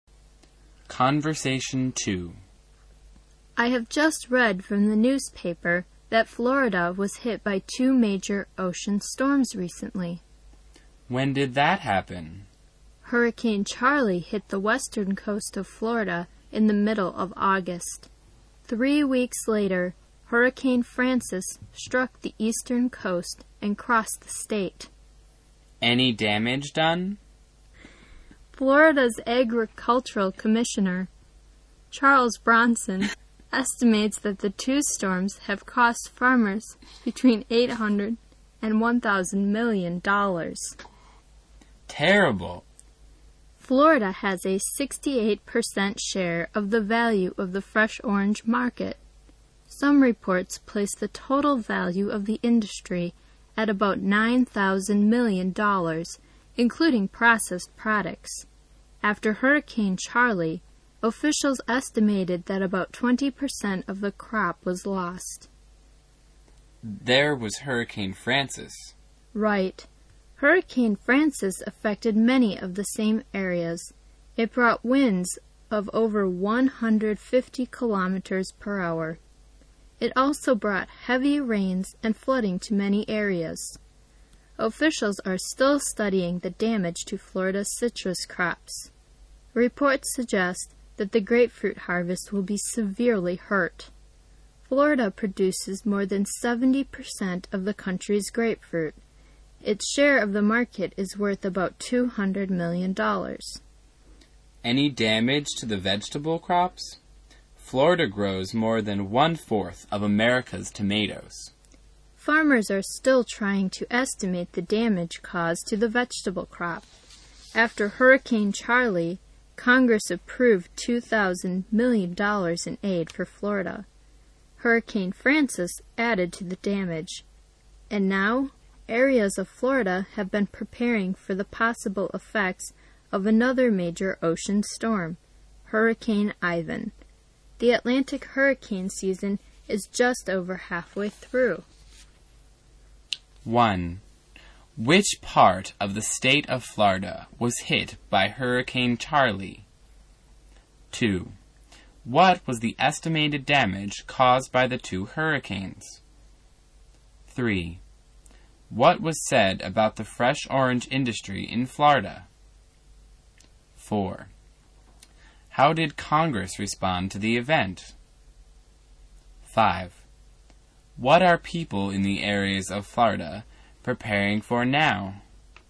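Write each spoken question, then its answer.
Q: Which part of the state of Florida was hit by Hurricane Charley?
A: The western coast

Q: What was the estimated damage caused by the 2 hurricanes?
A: Between $800 and $1,000 million to farmers

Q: How did Congress respond to the event?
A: It approved $2,000 million in aid for Florida

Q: What are people in the areas of Florida preparing for now?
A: Another major ocean storm, Hurricane Ivan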